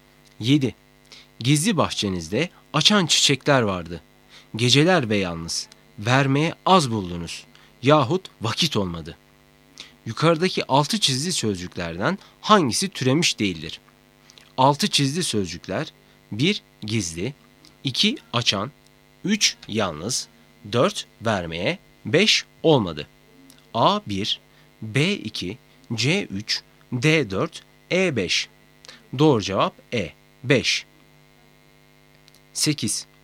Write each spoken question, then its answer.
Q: Yukarıdaki altı çizgi sözcüklerden hangisi türemiş değildir?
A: Doğru cevap E. 5